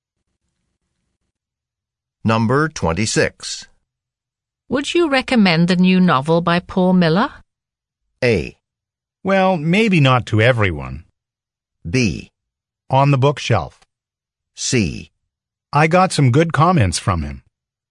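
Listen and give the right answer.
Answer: A: Well, maybe not to everyone.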